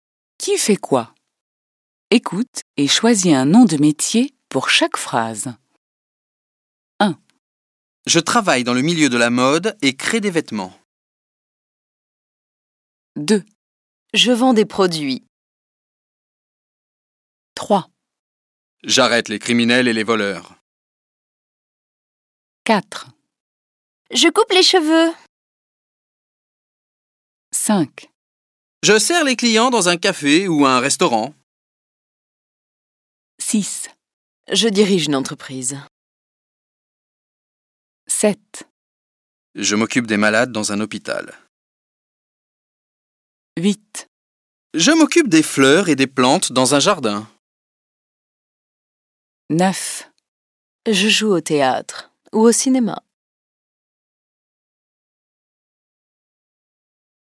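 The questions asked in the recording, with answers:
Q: J'arrête les criminels et les voleurs.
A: policier

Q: Je coupe les cheveux.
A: coiffeur

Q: Je sers les clients dans un café ou un restaurant.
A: serveur

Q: Je m'occupe des fleurs et des plantes dans un jardin.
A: jardinier

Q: Je joue au théâtre ou au cinéma.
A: acteur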